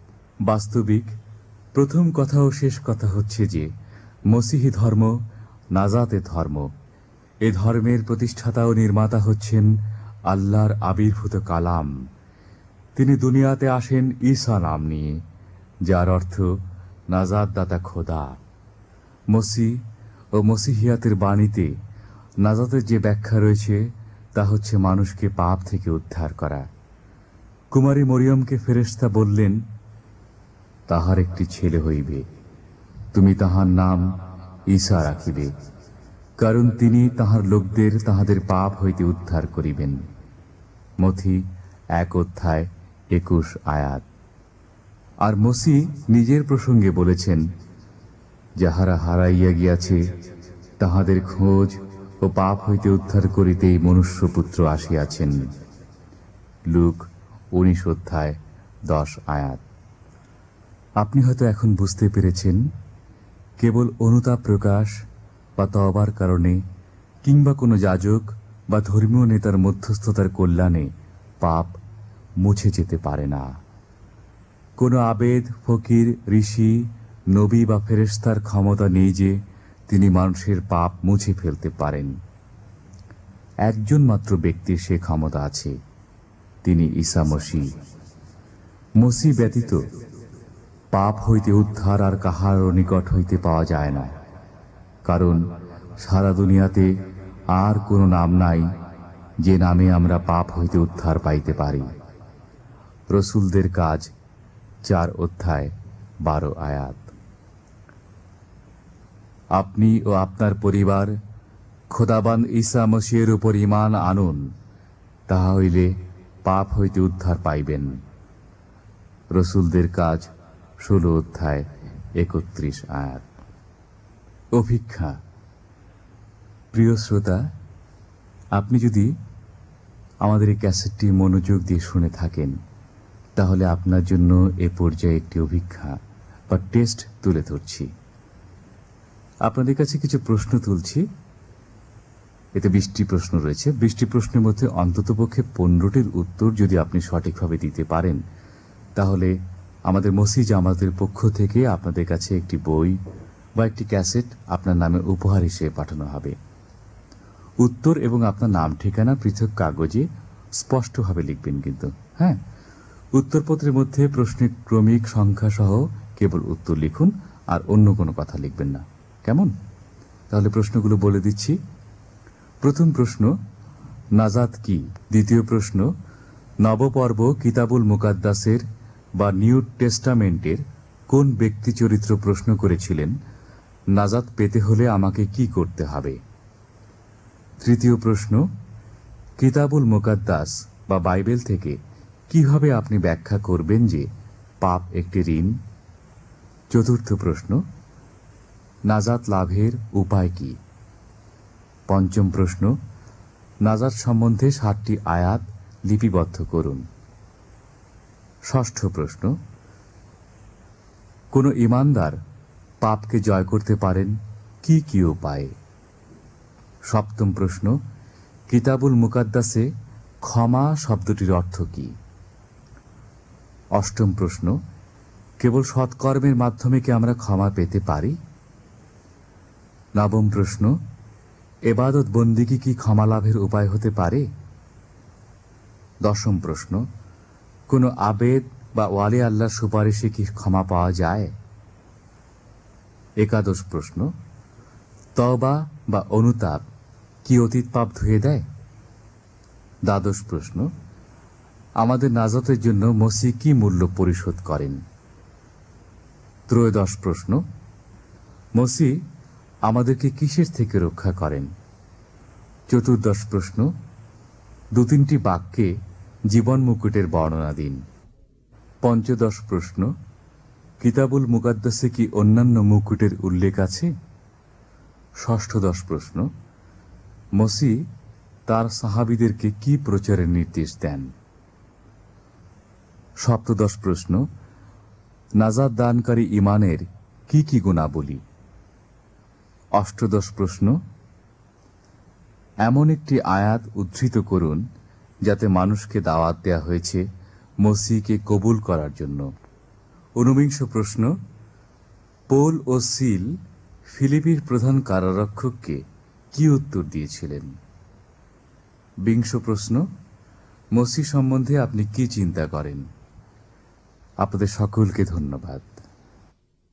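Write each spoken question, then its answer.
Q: কোনো আবেদ বা ওয়ালি আল্লাহর সুপারিশে কি ক্ষমা পাওয়া যায়?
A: না, একমাত্র ঈসা মসীহই পাপ মুছে ফেলতে পারেন

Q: মসি আমাদেরকে কিসের থেকে রক্ষা করেন?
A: পাপ থেকে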